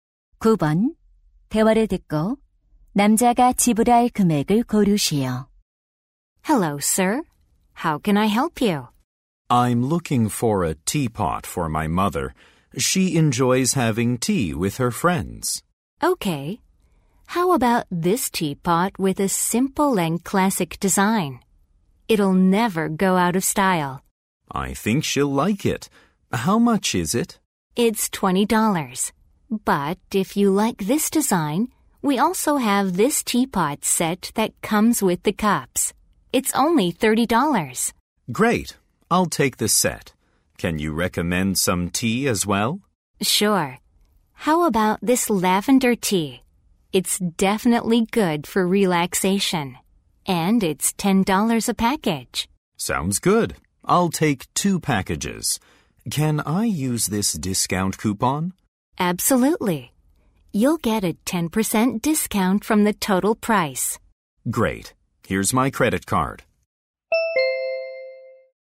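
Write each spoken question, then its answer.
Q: 대화를 듣고 남자가 지불할 금액을 고르시오.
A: 45달러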